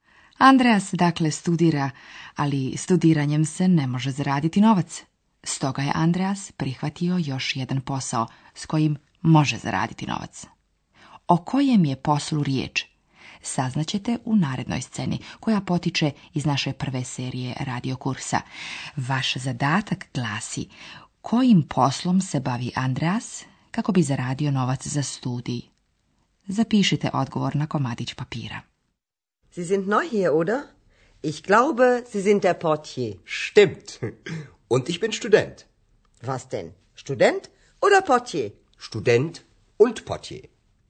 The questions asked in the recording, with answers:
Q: Vaš zadatak glasi kojim poslom se bavi Andreas kako bi zaradio novac za studij.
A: Odgovor je na njemačkom portier.